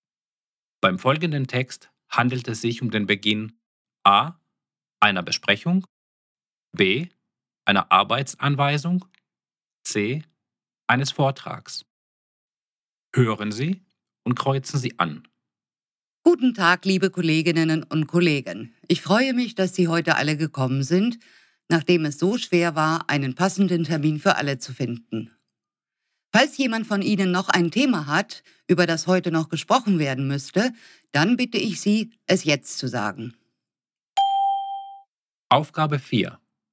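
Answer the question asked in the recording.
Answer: A: einer Besprechung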